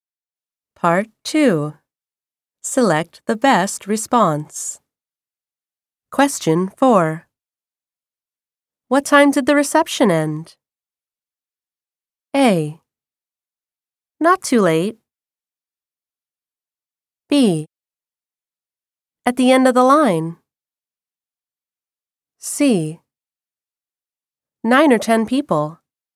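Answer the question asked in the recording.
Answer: A: Not too late.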